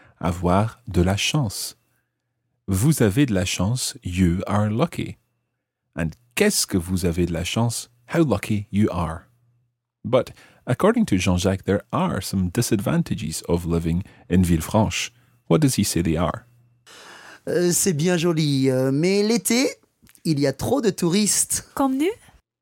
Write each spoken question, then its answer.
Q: What does he say they are?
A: So in the summer, there are too many tourists.